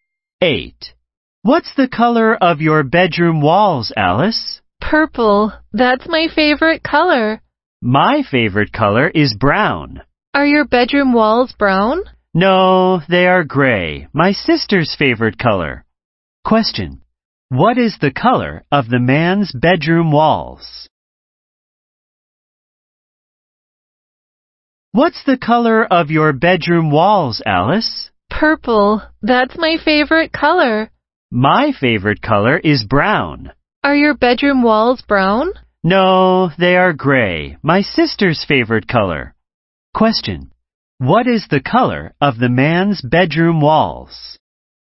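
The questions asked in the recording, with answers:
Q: what is the color of the man's bedroom walls?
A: Gray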